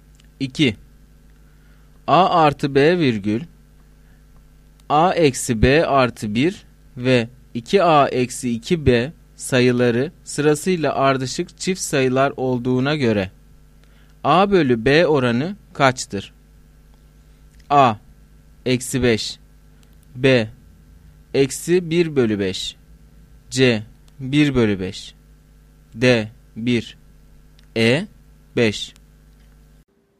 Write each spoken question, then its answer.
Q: A artı B virgül A eksi B artı 1 ve 2A eksi 2B sayıları sırasıyla ardışık çift sayılar olduğuna göre A bölü B oranı kaçtır?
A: Doğru cevap A şıkkı.